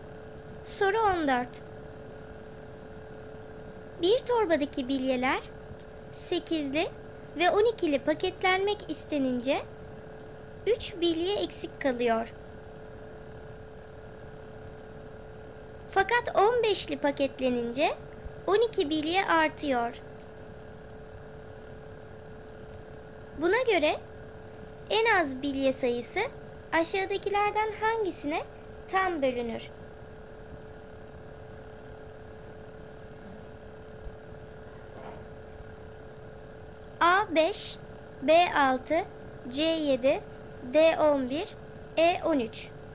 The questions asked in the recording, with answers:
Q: Buna göre en az bilye sayısı aşağıdakilerden hangisine tam bölünür?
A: Doğru cevap E13.